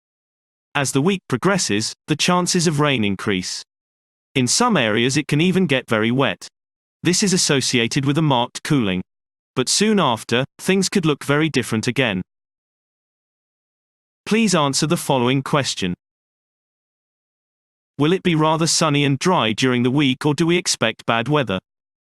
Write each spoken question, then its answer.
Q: Will it be rather sunny and dry during the week, or do we expect bad weather?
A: So, bad weather is predicted.